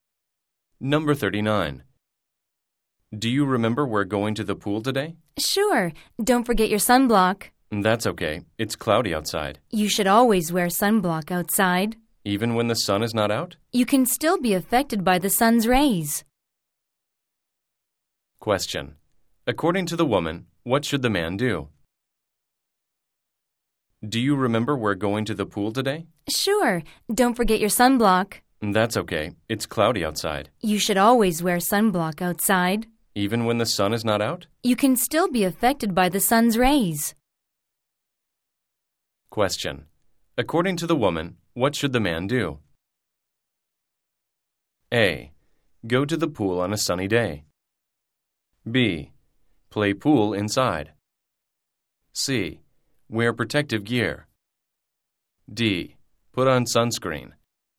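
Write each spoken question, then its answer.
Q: According to the woman, what should the man do?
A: D: Put on sunscreen.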